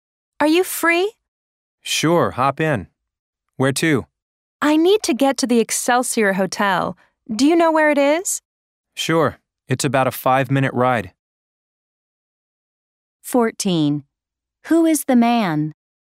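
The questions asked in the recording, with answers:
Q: Who is the man?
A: A taxi driver.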